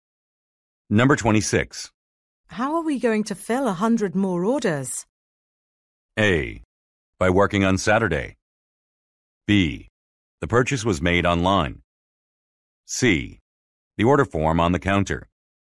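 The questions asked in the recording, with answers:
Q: How are we going to fill 100 more orders?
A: A: By working on Saturday.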